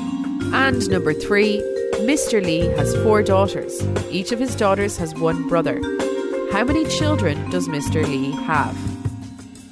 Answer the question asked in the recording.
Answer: The answer is 5.